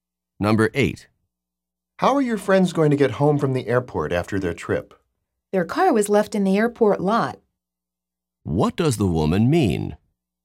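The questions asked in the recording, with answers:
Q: What does the woman mean?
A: They left their car in the airport parking lot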